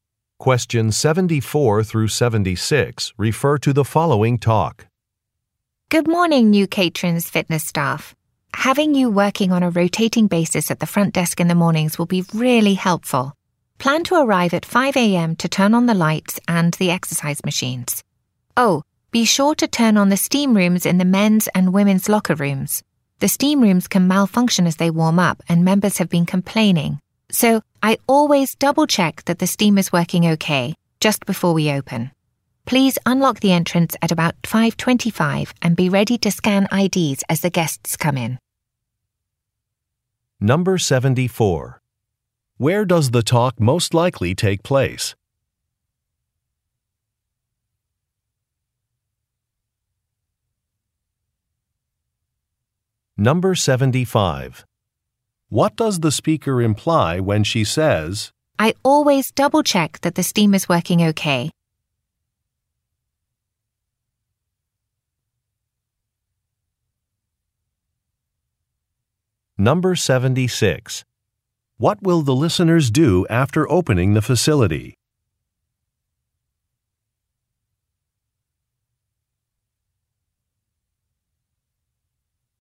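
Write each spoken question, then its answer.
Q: Where does the talk most likely take place?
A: At a fitness center

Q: What will the listeners do after opening the facility?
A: Scan guests' IDs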